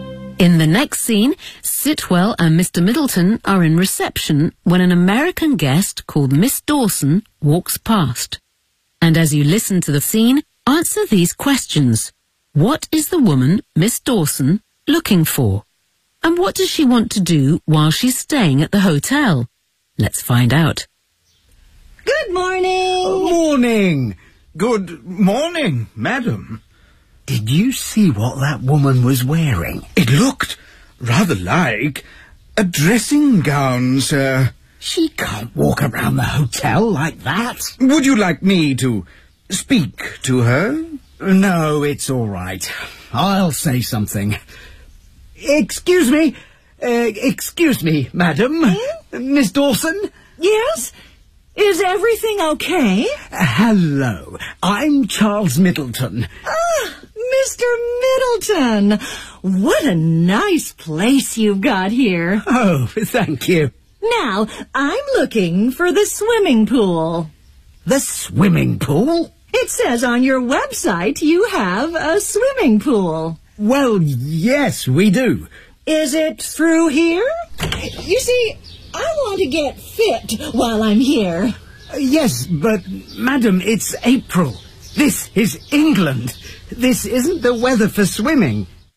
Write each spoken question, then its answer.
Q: What is the woman, Miss Dawson, looking for?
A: I'm looking for the swimming pool.